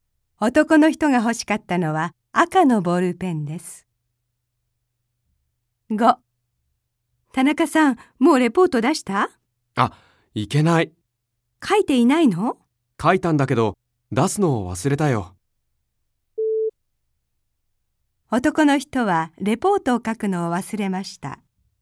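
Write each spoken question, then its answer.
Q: 男の人はレポートを書くのを忘れました。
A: 正しくない(出すのを忘れた)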